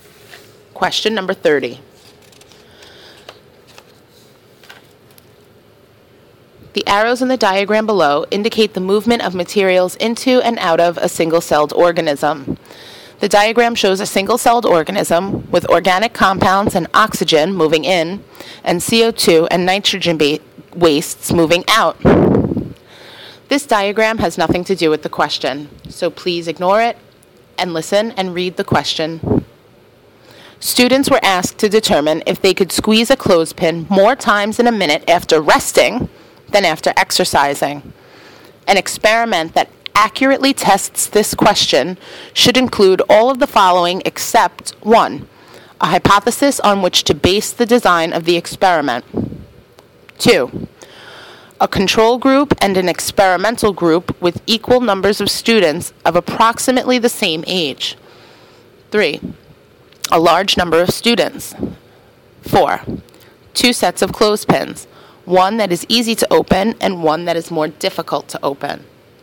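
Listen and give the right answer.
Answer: 4: Two sets of clothespins, one that is easy to open and one that is more difficult to open.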